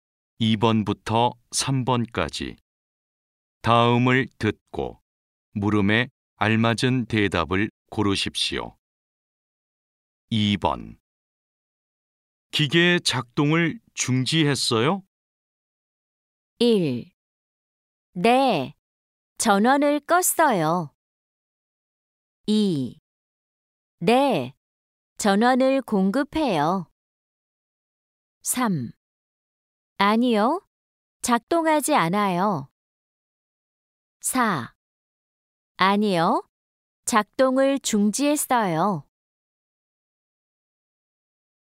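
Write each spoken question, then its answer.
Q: 기계의 작동을 중지했어요?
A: 1: 네, 전원을 껐어요.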